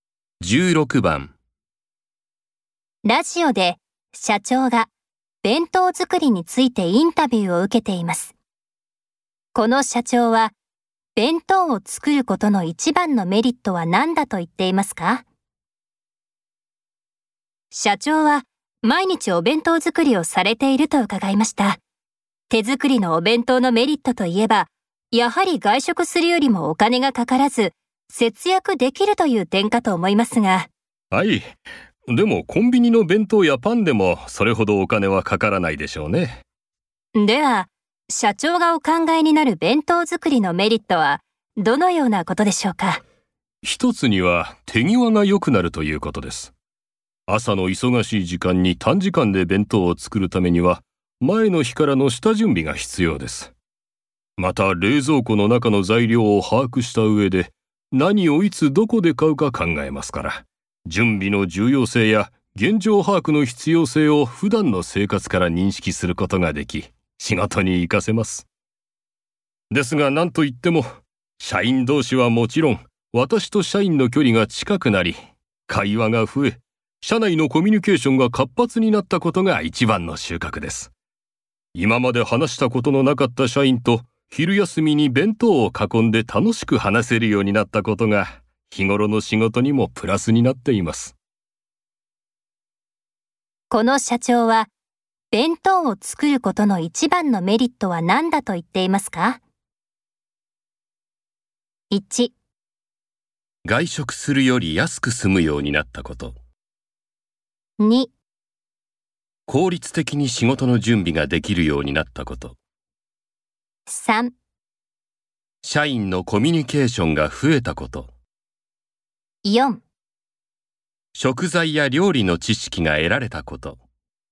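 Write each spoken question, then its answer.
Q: この社長は弁当を作ることの一番のメリットは何だと言っていますか?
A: 3: 社員のコミュニケーションが増えたこと。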